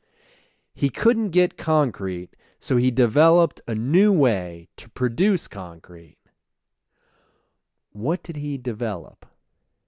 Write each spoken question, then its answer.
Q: What did he develop?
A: He developed a new way to produce concrete.